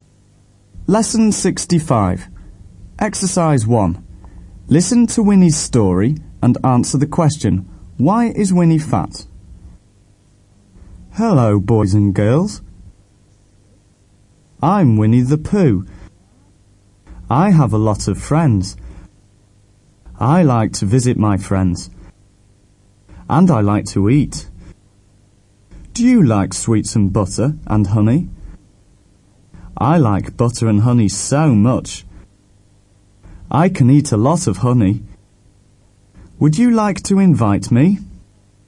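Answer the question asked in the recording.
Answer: He likes to eat and eats a lot of honey and butter.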